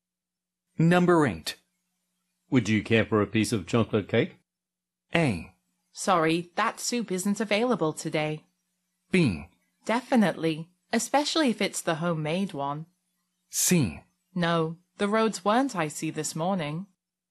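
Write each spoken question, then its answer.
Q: Would you care for a piece of chocolate cake?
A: B: Definitely, especially if it's the homemade one.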